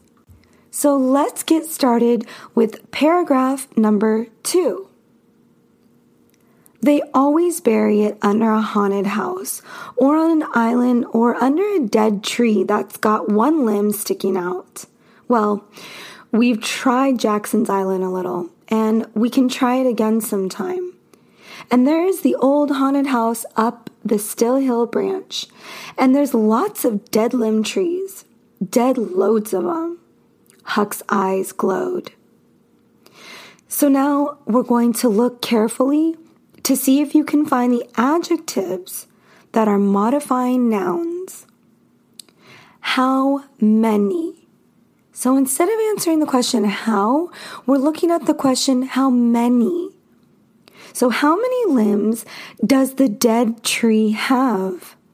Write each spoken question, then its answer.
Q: So how many limbs does the dead tree have?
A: And the answer is one limb.